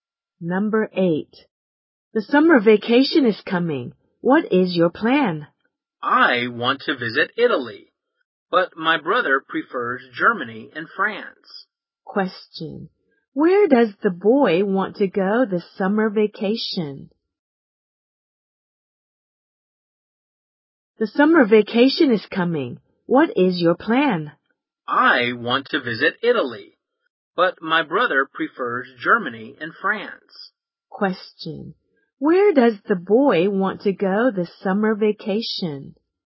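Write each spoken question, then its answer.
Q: Where does the boy want to go this summer vacation?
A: Italy.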